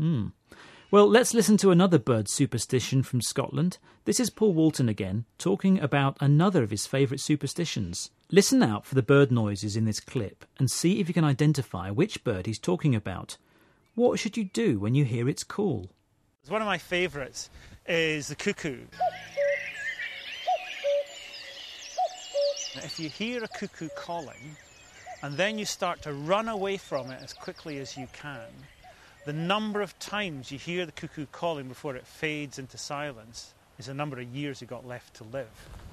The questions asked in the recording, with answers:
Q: What should you do when you hear its call?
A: But in Scotland, if you hear the cuckoo calling, then you should run away from it as quickly as you can.